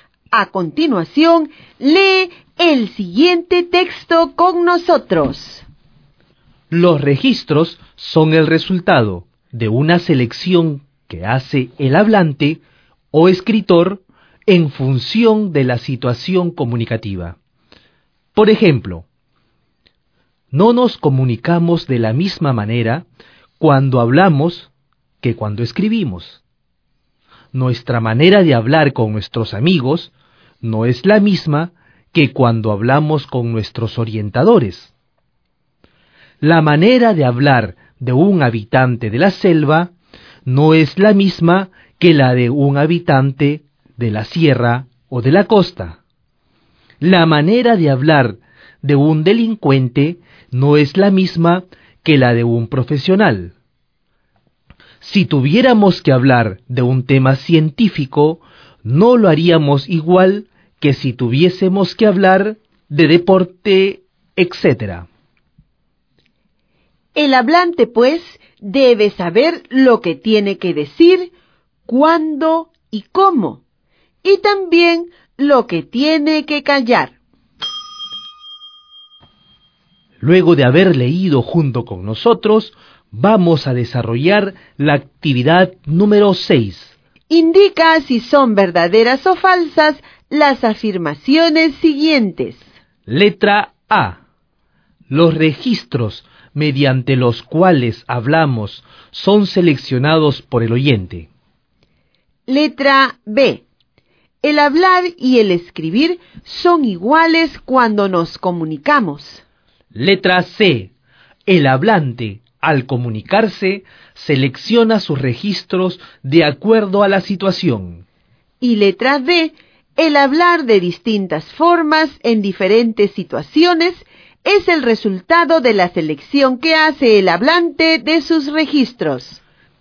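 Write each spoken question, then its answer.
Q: Letra A. Los registros mediante los cuales hablamos son seleccionados por el oyente.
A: Falso

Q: Letra B. El hablar y el escribir son iguales cuando nos comunicamos.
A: Falso

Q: Letra C. El hablante, al comunicarse, selecciona sus registros de acuerdo a la situación.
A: Verdadero

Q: Y letra D. El hablar de distintas formas en diferentes situaciones es el resultado de la selección que hace el hablante de sus registros.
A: Verdadero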